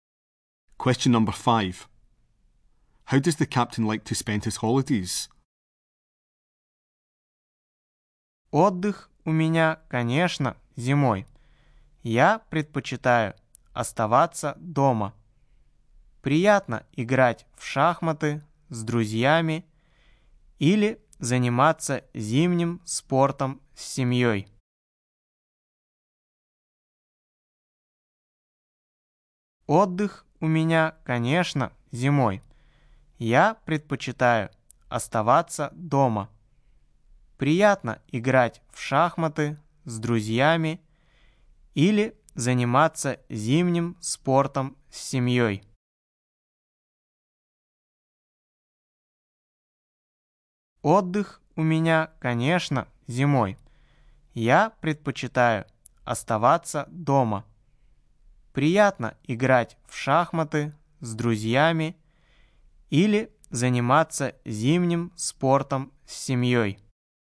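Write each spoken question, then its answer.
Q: How does the captain like to spend his holidays?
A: In winter at home, playing chess with friends or doing winter sports with his family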